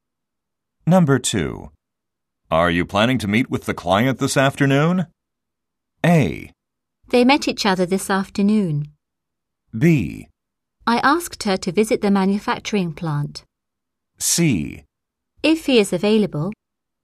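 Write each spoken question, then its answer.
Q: Are you planning to meet with the client this afternoon?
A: C: If he is available.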